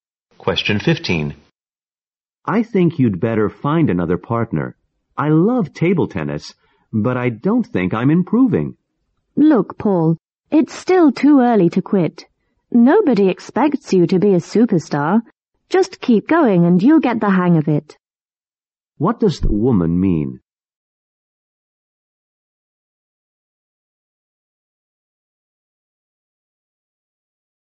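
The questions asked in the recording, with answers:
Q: What does the woman mean?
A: Paul should keep practicing table tennis instead of quitting.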